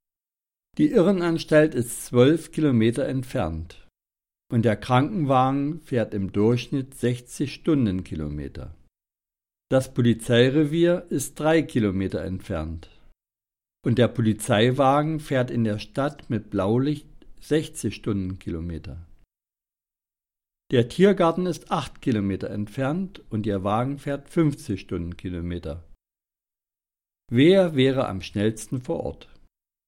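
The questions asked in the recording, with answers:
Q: Wer wäre am schnellsten vor Ort?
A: Die Polizei (3 Minuten)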